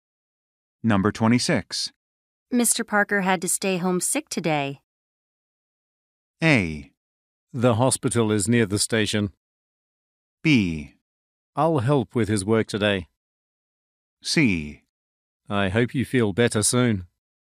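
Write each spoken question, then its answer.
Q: Mr. Parker had to stay home sick today.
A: B: I'll help with his work today.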